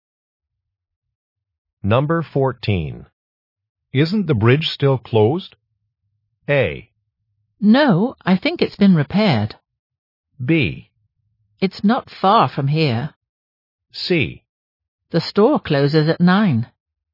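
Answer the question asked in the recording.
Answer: A: No, I think it's been repaired.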